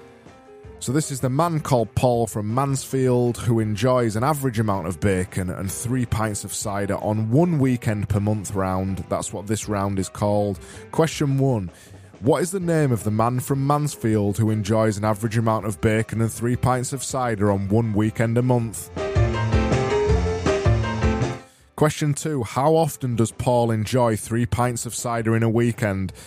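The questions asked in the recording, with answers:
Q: What is the name of the man from Mansfield who enjoys an average amount of bacon and 3 pints of cider on one weekend a month?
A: Paul

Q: How often does Paul enjoy 3 pints of cider in a weekend?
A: One weekend per month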